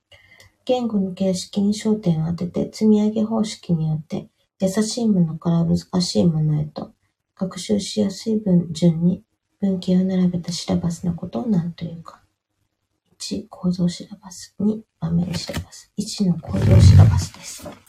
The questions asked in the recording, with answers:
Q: 言語の形式に焦点を当てて、積み上げ方式によって、優しいものから難しいものへと、学習しやすい文順に文型を並べたシラバスのことを何というか。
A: 1の構造シラバスです。